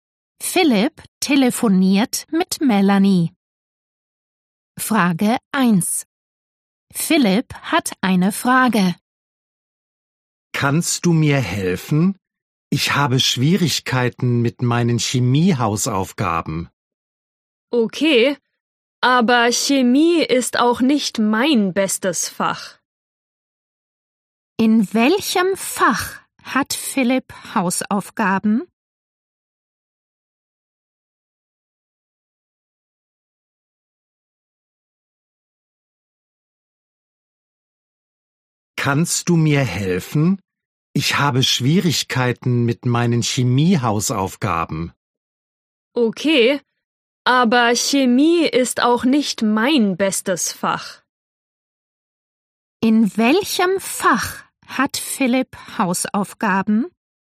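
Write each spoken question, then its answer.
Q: In welchem Fach hat Philipp Hausaufgaben?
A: Chemie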